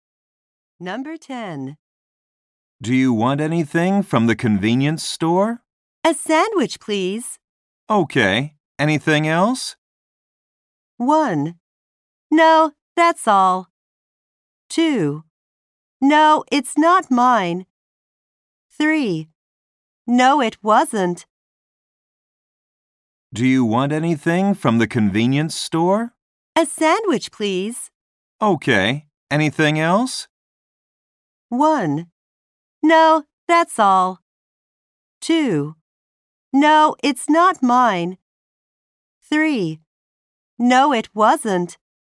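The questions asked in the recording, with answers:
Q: Okay. Anything else?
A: 1: No, that's all.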